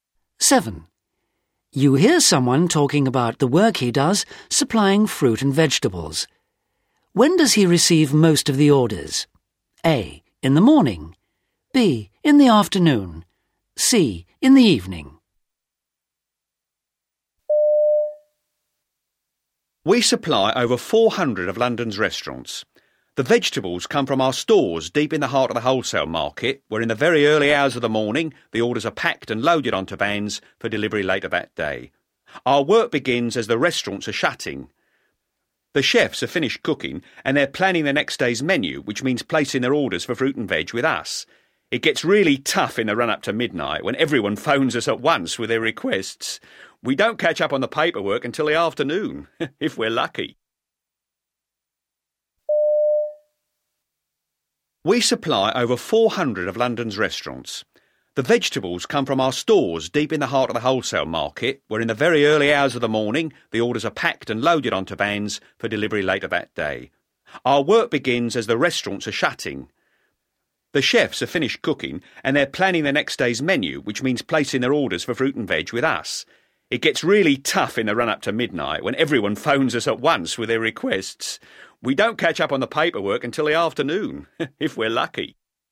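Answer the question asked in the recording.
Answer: C: In the evening.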